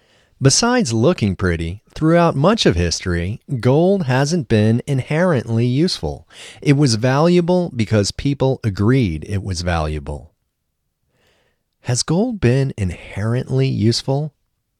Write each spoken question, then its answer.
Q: Has gold been inherently useful?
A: No, gold hasn't been inherently useful.